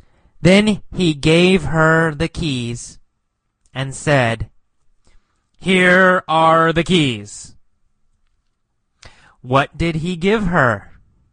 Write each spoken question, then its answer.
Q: What did he give her?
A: The keys, right? The keys to his car.